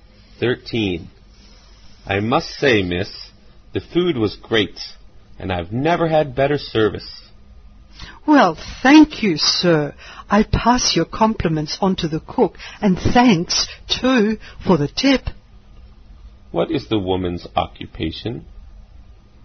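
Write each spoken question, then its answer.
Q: What is the woman's occupation?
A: Waitress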